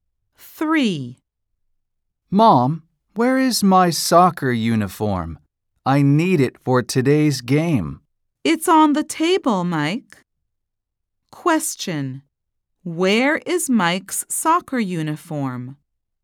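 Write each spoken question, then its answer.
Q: Where is Mike's soccer uniform?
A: on the table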